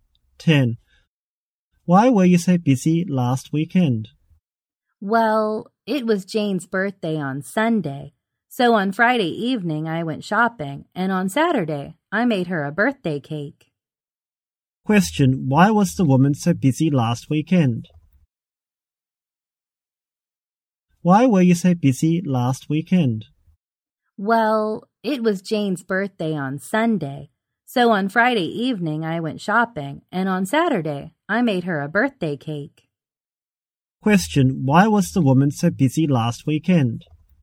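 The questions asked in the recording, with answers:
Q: Question, why was the woman so busy last weekend?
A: It was Jane's birthday; she went shopping and made a birthday cake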